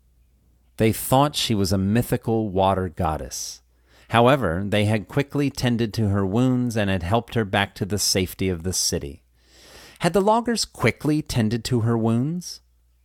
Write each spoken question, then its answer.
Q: Had the loggers quickly tended to her wounds?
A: Yes, the loggers had quickly tended to her wounds.